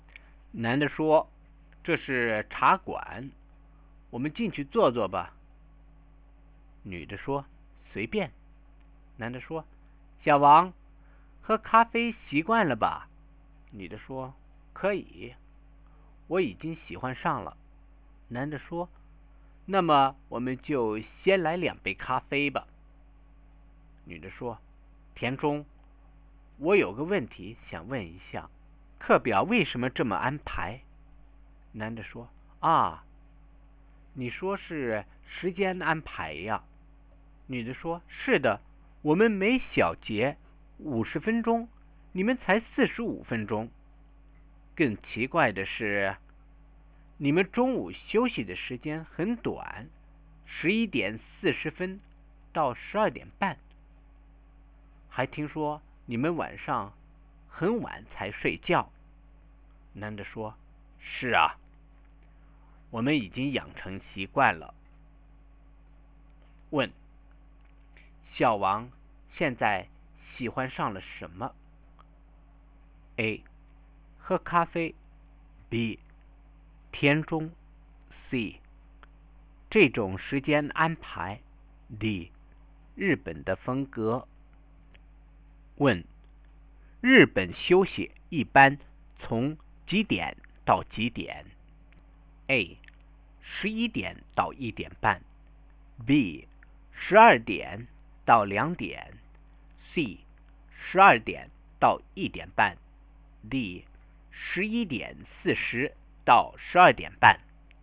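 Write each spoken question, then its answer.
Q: 小王现在喜欢上了什么?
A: A: 喝咖啡。

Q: 日本休息一般从几点到几点?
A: D: 11:40到12:30。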